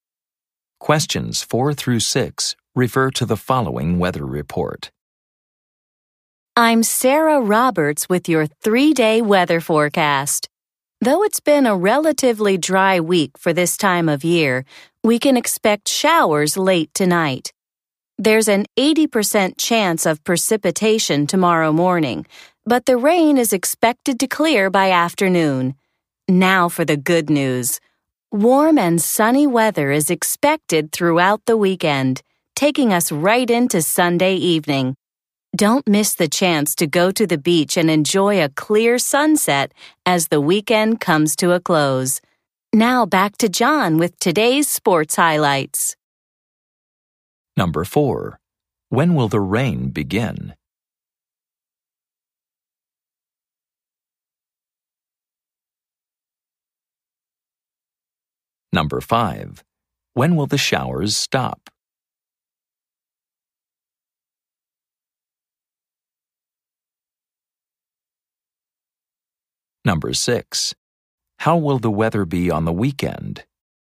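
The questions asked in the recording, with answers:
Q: When will the rain begin?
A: Late tonight

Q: When will the showers stop?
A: Tomorrow afternoon

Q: How will the weather be on the weekend?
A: Warm and sunny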